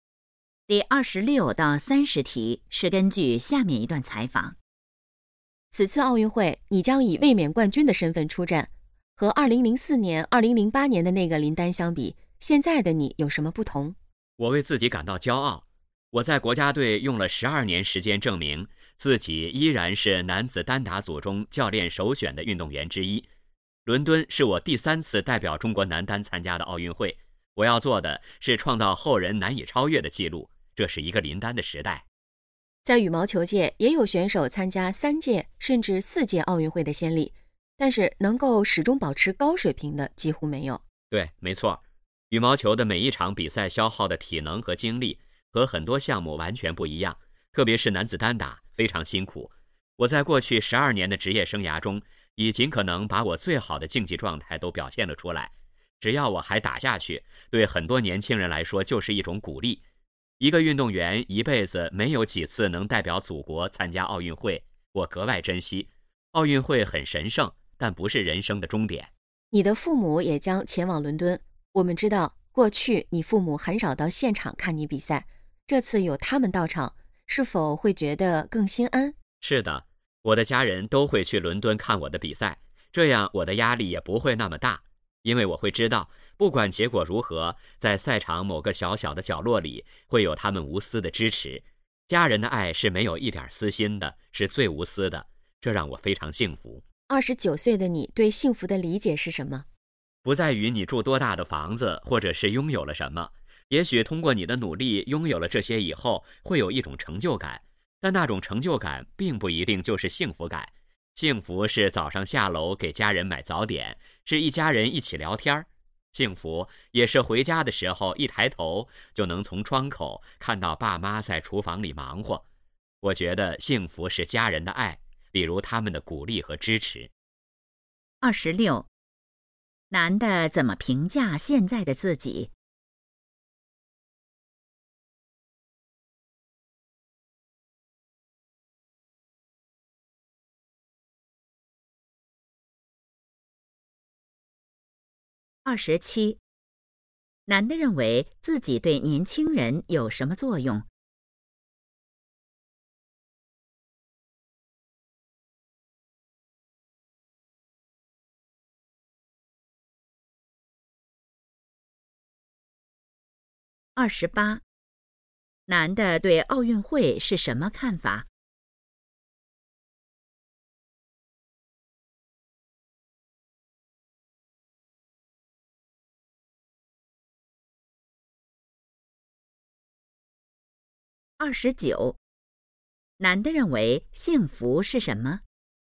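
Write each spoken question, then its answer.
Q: 男的怎么评价现在的自己?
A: 为自己感到骄傲

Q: 男的认为自己对年轻人有什么作用?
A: 是一种鼓励

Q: 男的对奥运会是什么看法?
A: 很神圣,但不是人生的终点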